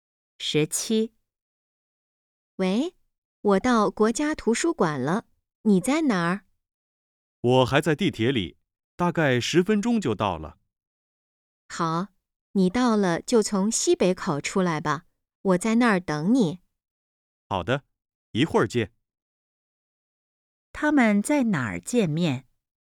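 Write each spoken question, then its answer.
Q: 他们在哪儿见面?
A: 国家图书馆西北口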